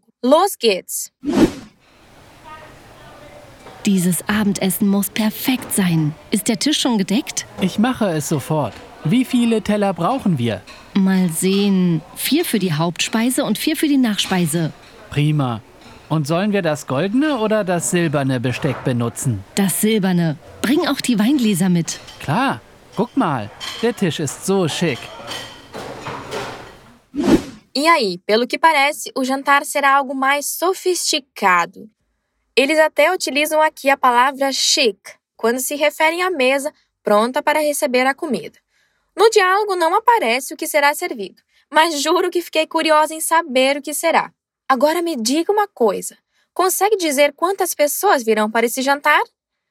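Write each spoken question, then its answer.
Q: Agora me diga uma coisa: consegue dizer quantas pessoas virão para esse jantar?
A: Quatro pessoas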